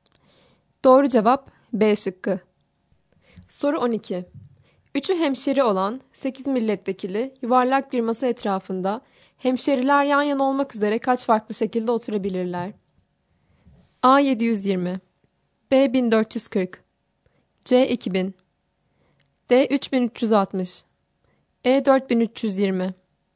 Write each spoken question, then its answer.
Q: 3'ü hemşeri olan 8 milletvekili yuvarlak bir masa etrafında Hemşeriler yan yana olmak üzere kaç farklı şekilde oturabilirler?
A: Doğru cevap A şıkkı.